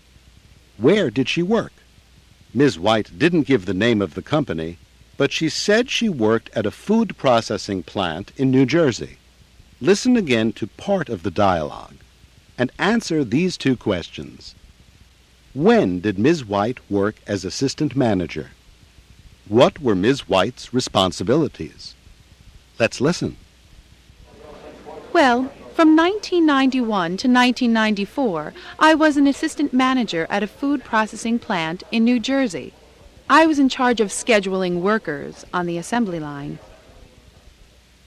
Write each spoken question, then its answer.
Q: When did Ms. White work as assistant manager?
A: She was assistant manager from 1991 to 1994.

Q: What were Ms. White's responsibilities?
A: She was in charge of scheduling workers.